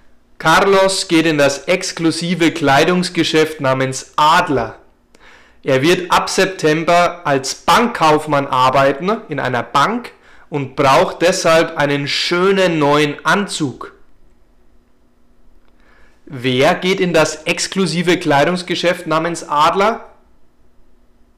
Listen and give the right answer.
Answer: Carlos. Carlos geht in das exklusive Kleidungsgeschäft namens Adler.